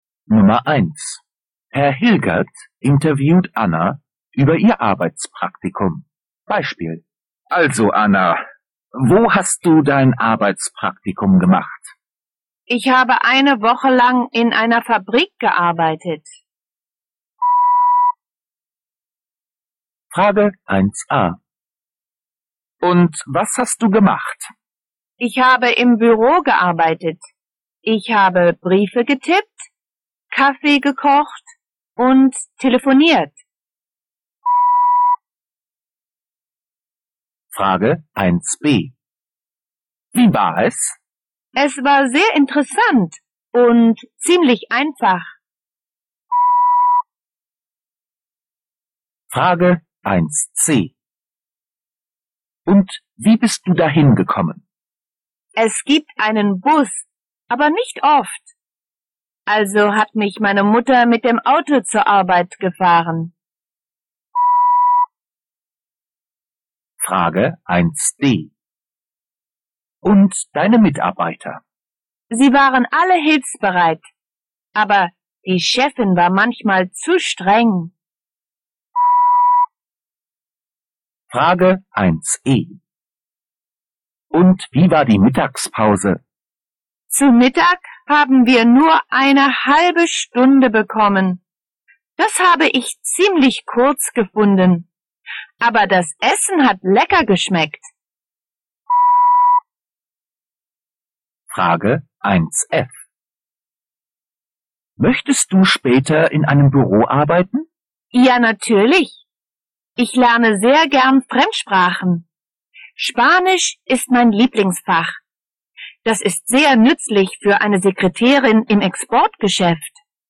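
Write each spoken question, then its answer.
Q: Und was hast du gemacht?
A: Sie hat im Büro gearbeitet: Briefe getippt, Kaffee gekocht und telefoniert.

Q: Wie war es?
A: Sehr interessant und ziemlich einfach.

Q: Und wie bist du dahin gekommen?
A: Ihre Mutter hat sie mit dem Auto gefahren.

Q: Und deine Mitarbeiter?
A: Alle hilfsbereit, aber die Chefin war manchmal zu streng.

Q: Und wie war die Mittagspause?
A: Nur eine halbe Stunde, ziemlich kurz, aber das Essen war lecker.

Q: Möchtest du später in einem Büro arbeiten?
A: Ja, als Sekretärin im Exportgeschäft, weil sie gern Fremdsprachen lernt.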